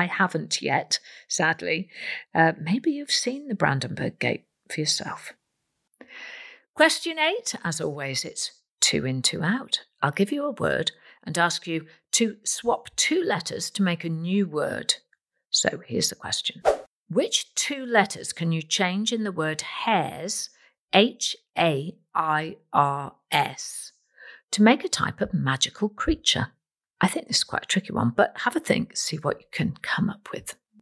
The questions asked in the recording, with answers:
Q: Which two letters can you change in the word hairs,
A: Well, if you change the letter H for an F and change the letter S into a Y, you get fairy, F-A-I-R-Y.